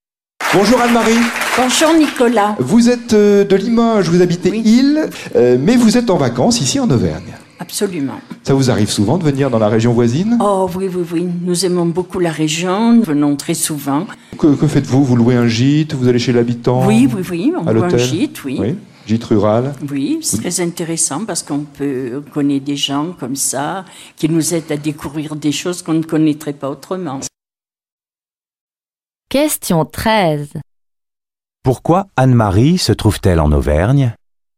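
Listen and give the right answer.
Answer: Elle est en vacances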